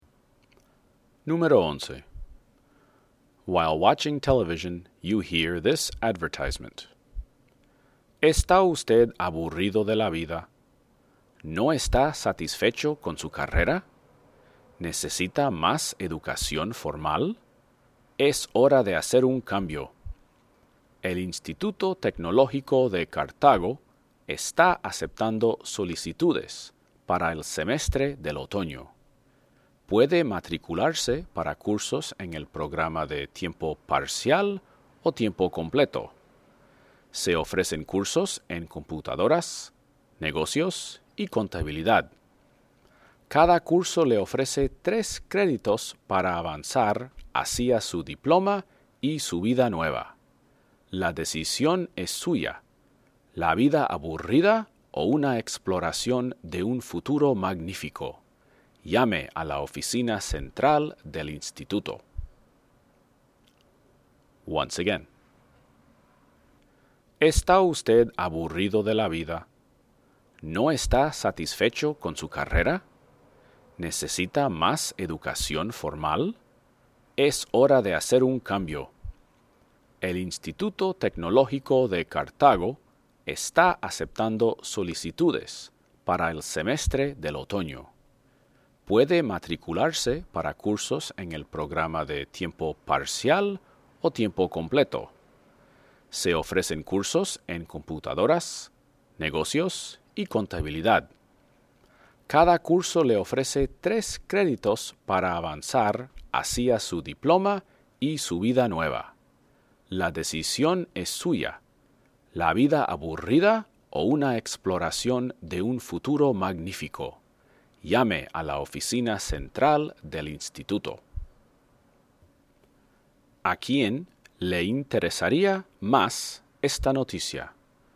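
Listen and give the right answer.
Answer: A alguien aburrido o insatisfecho con su carrera que quiere más educación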